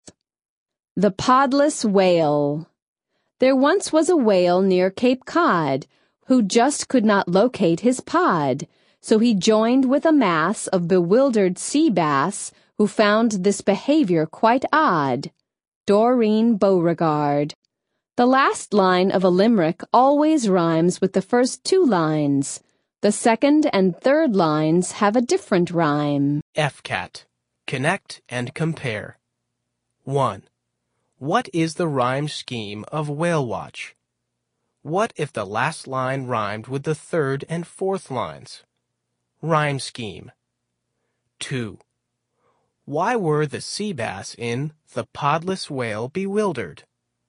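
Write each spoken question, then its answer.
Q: Why were the sea bass in The Podless Whale bewildered?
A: Because a whale that couldn't find his pod joined their group, and they found this odd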